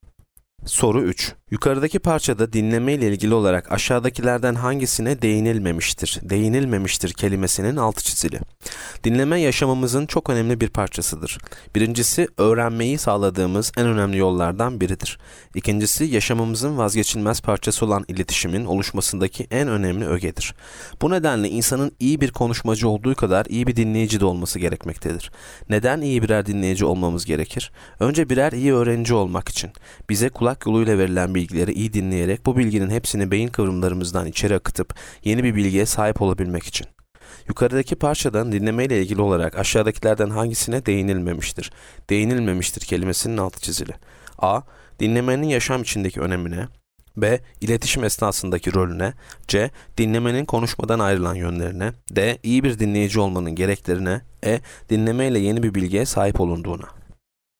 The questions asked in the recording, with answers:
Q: Yukarıdaki parçada dinleme ile ilgili olarak aşağıdakilerden hangisine değinilmemiştir?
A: Yanıt C. Dinlemenin konuşmadan ayrılan yönlerine.